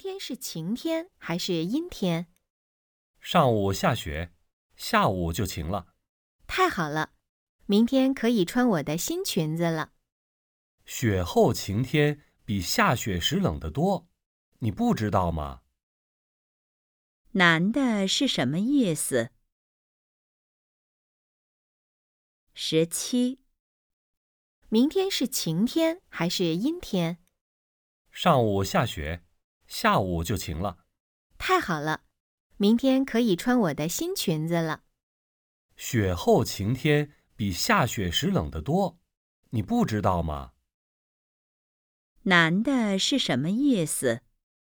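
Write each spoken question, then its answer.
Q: 男的是什么意思?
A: 雪后晴天很冷,不适合穿裙子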